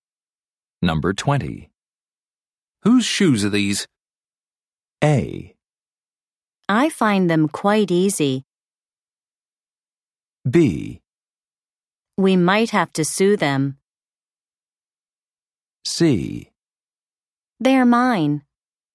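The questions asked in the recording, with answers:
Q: Whose shoes are these?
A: C: They're mine.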